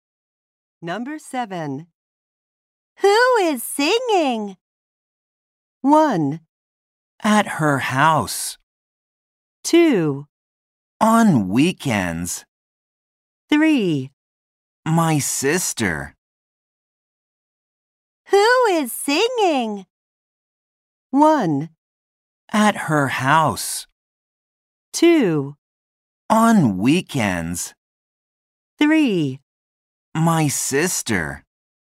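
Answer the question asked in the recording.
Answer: 3: My sister.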